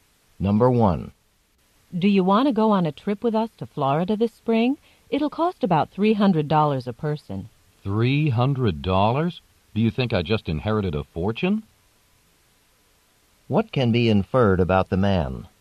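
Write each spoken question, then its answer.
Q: What can be inferred about the man?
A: He thinks the trip is too expensive for him.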